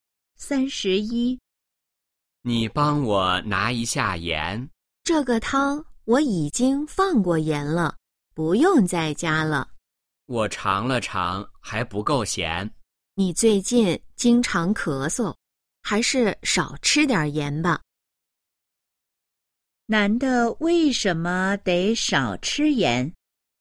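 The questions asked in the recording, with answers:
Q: 男的为什么得少吃盐?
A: 最近经常咳嗽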